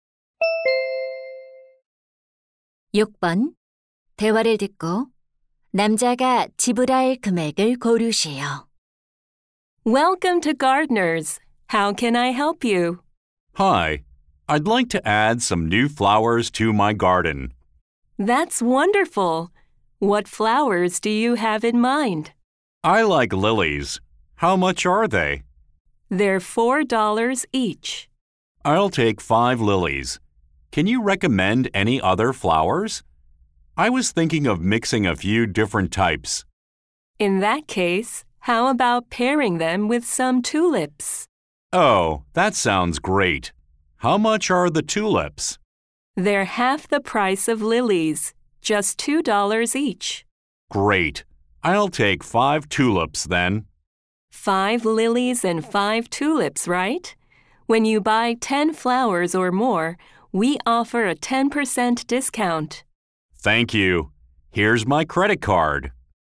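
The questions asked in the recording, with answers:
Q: 대화를 듣고 남자가 지불할 금액을 고르시오.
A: $27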